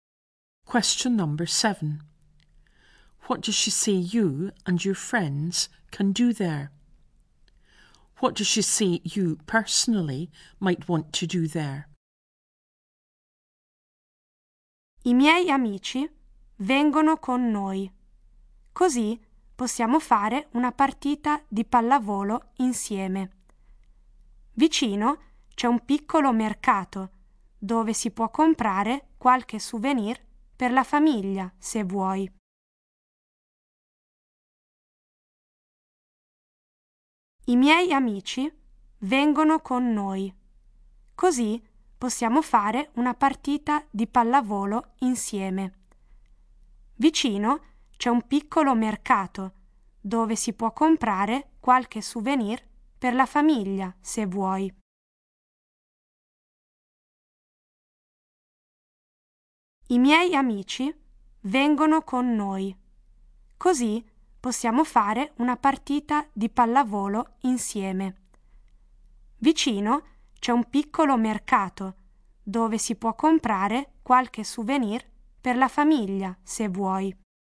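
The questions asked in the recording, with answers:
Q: What does she say you and your friends can do there?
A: Play a game of volleyball together

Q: What does she say you personally might want to do there?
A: Buy souvenirs for your family at a small market nearby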